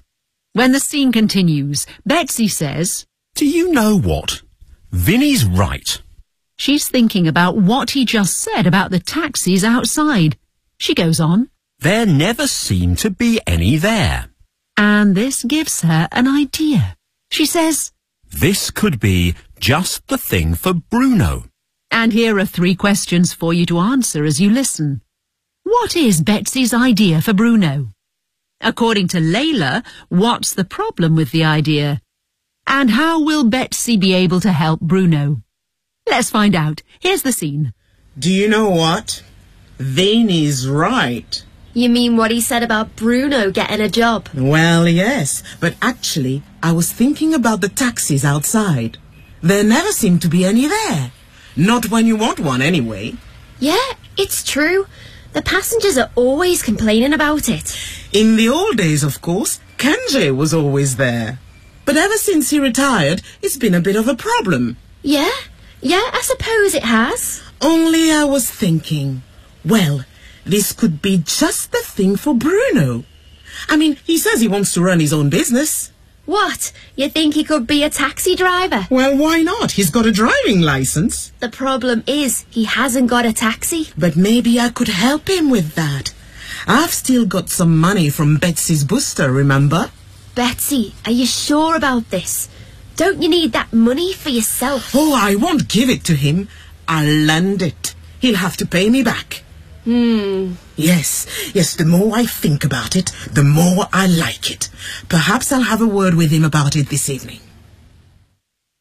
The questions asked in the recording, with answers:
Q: What is Betsy's idea for Bruno?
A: She thinks he should become a taxi driver.

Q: According to Layla, what's the problem with the idea?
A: The problem is he hasn't got a taxi.

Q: And how will Betsy be able to help Bruno?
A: Maybe I could help him with that.